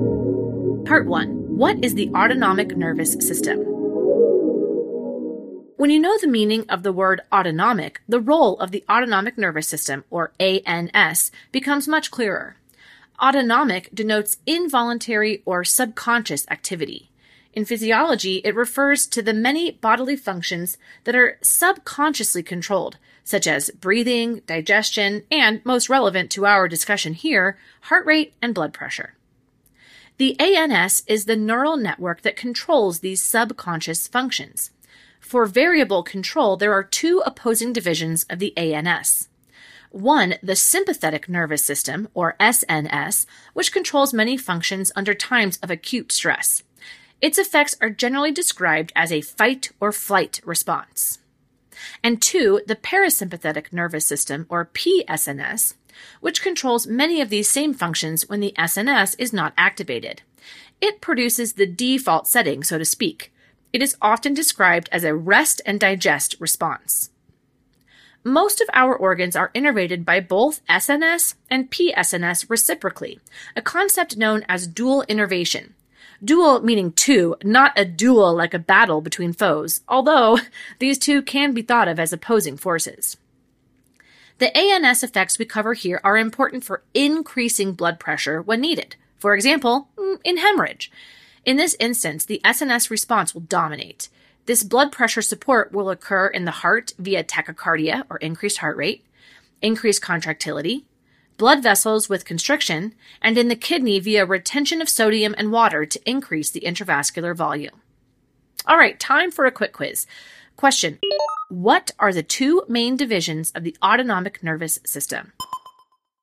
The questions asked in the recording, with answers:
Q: what are the two main divisions of the autonomic nervous system?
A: the two main divisions are the sympathetic and parasympathetic nervous systems.